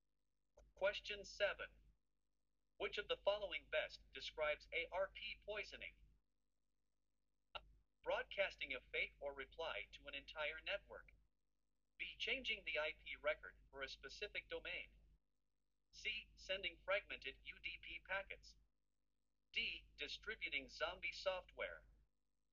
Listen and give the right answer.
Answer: The correct answer is A.